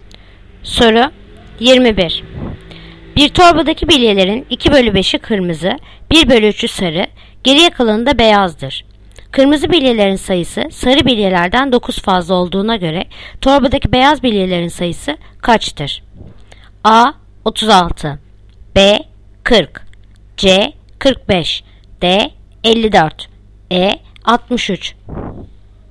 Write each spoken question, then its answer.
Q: Kırmızı bilyelerin sayısı sarı bilyelerden 9 fazla olduğuna göre torbadaki beyaz bilyelerin sayısı kaçtır?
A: Yanıt Adana 36.